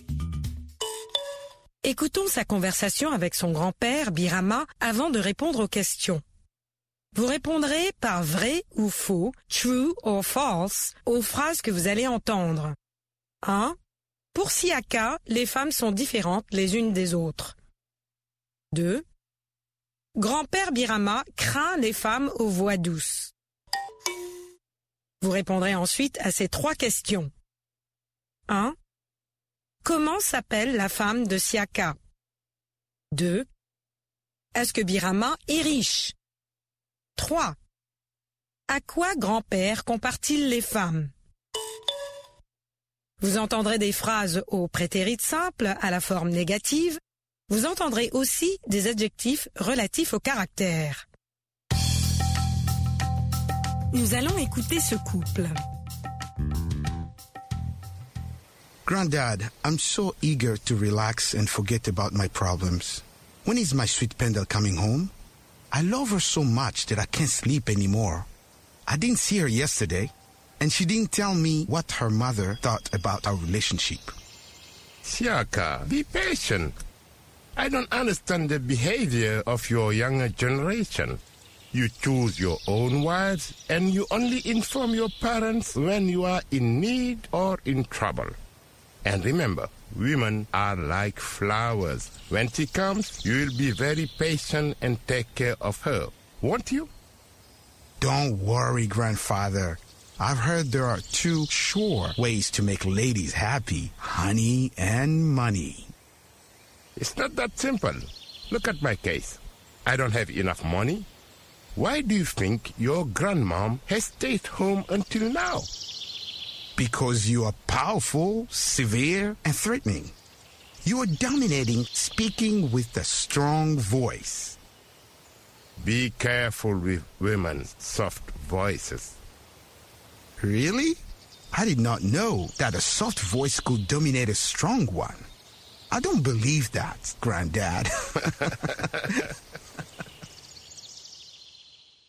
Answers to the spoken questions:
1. l'énoncé 1 est faux.
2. L'énoncé 2 est vrai.
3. La femme de Siaka s'appelle Pendel.
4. Non, Birama n'est pas riche, mais patient.
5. Grand-père compare les femmes aux fleurs.